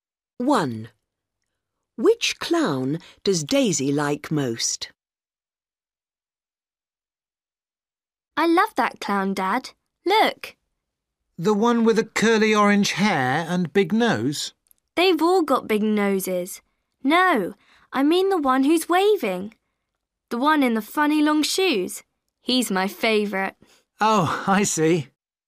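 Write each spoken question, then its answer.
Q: Which clown does Daisy like most?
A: The one who's waving, in the funny long shoes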